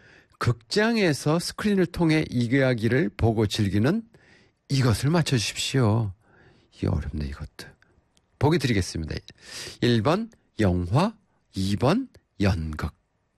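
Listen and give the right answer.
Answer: 1번: 영화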